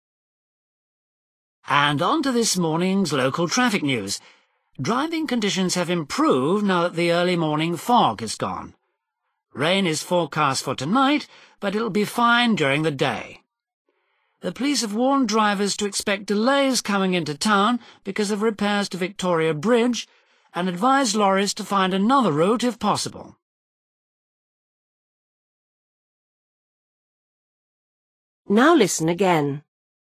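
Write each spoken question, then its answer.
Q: Why will drivers have problems this morning?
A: Because of repairs to Victoria Bridge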